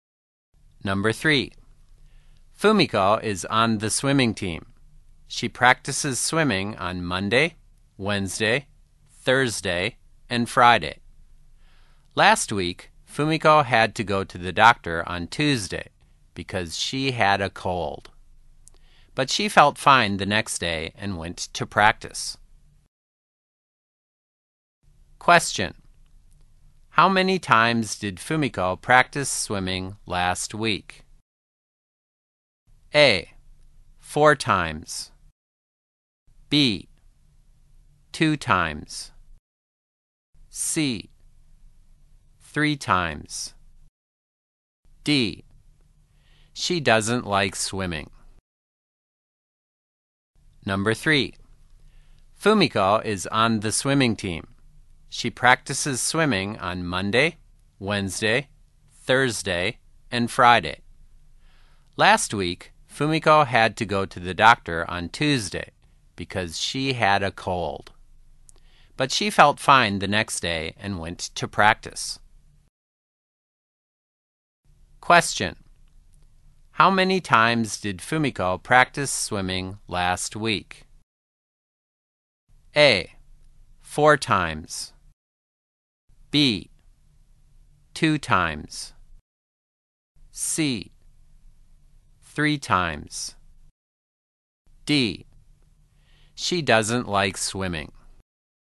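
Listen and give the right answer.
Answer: A: 4 times.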